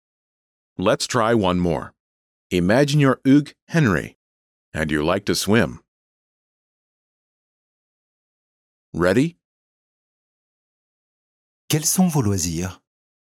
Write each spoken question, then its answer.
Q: Quels sont vos loisirs?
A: J'aime nager.